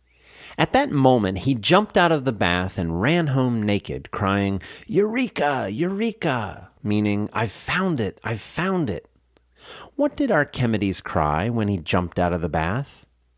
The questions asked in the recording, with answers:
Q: What did Archimedes cry when he jumped out of the bath?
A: He cried, "Eureka! Eureka!"